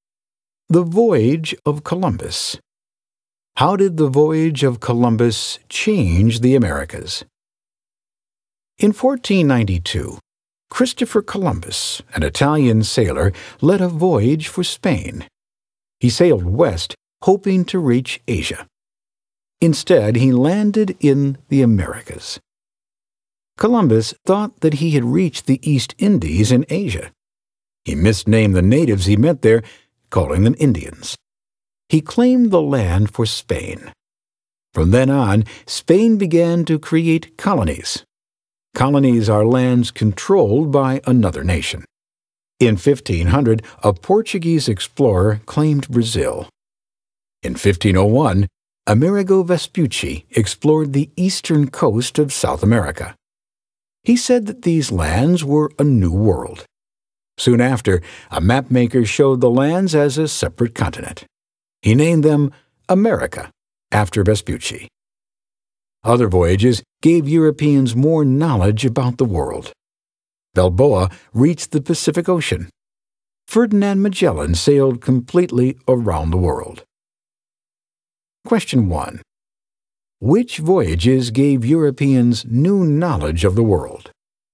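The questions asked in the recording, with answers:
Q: Which voyages gave Europeans new knowledge of the world?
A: Columbus's, Vespucci's, Balboa's reaching the Pacific, and Magellan's voyage around the world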